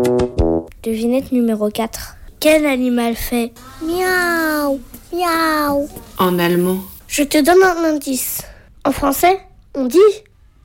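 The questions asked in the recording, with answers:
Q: Quel animal fait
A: le chat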